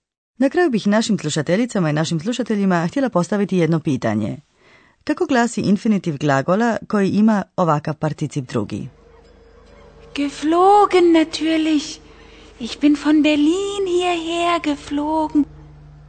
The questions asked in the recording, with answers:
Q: Kako glasi infinitiv glagola koji ima ovakav particip drugi?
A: Infinitiv glasi fliegen, letjeti